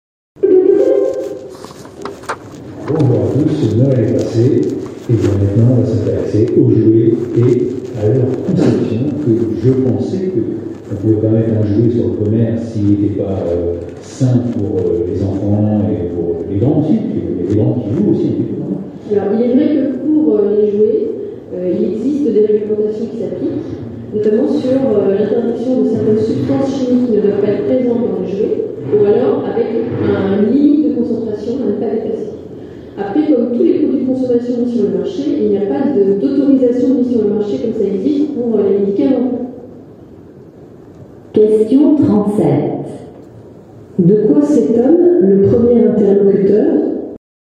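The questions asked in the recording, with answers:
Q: De quoi s'étonne le premier interlocuteur ?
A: Qu'on puisse vendre des jouets qui ne sont pas sains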